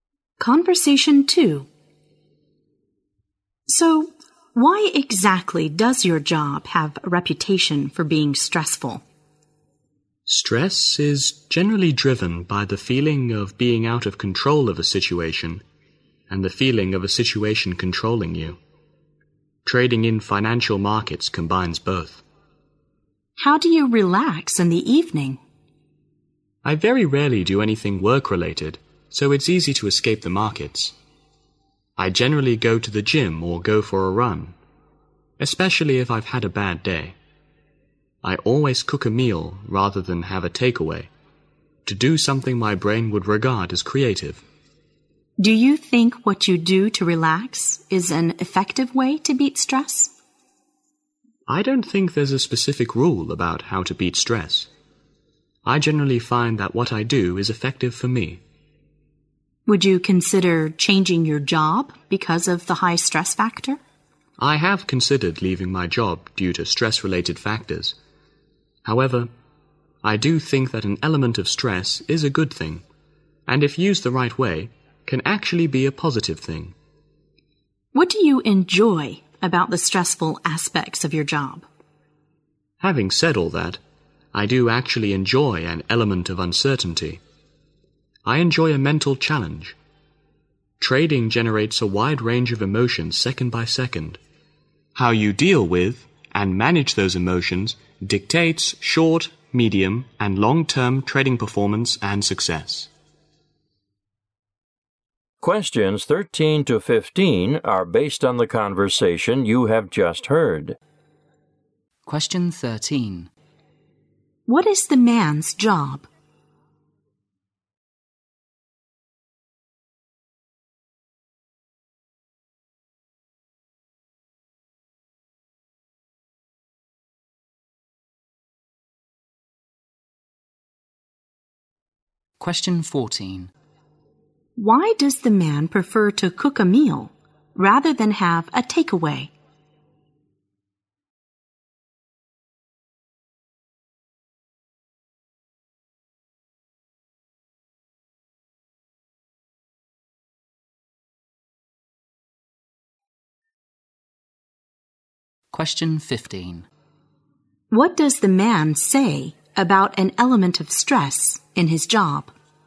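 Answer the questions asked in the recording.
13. Trading in financial markets
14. To do something creative
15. It can be a good, positive thing if used right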